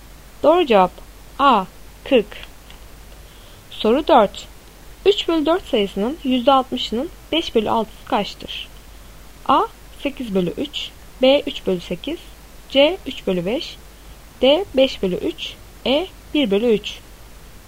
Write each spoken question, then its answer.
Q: 3 bölü 4 sayısının %60'ının 5 bölü 6'sı kaçtır?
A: Doğru cevap B 3 bölü 8.